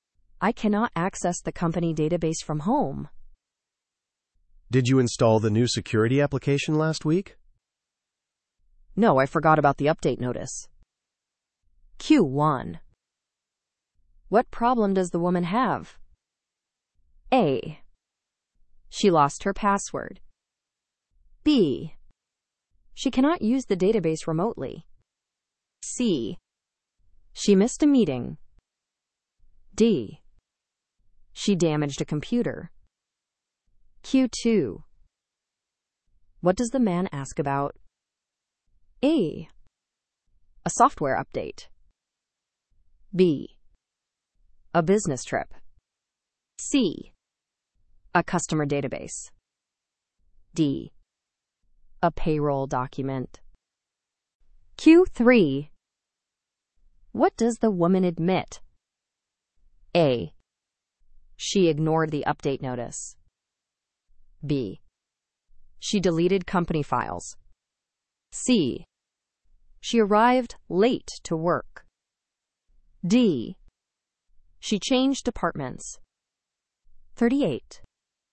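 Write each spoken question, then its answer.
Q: What problem does the woman have?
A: B: She cannot use the database remotely.

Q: What does the man ask about?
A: A: A software update.

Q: What does the woman admit?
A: A: She ignored the update notice.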